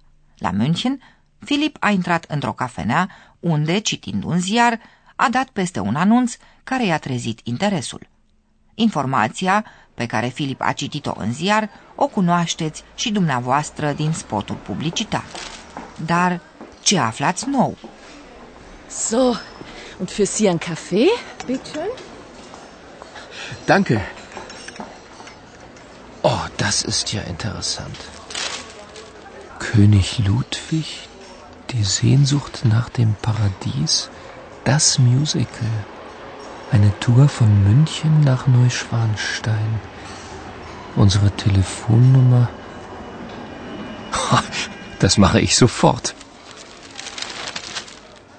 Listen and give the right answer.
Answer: Informația nouă pentru dumneavoastră este că, de la München, se organizează excursii la castelul Neuschwanstein.